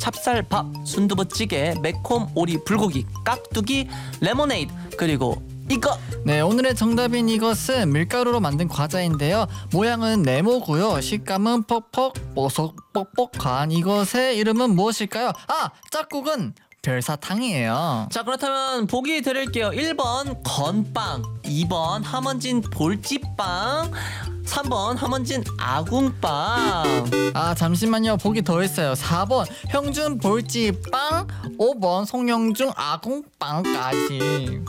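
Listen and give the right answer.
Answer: 1: 건빵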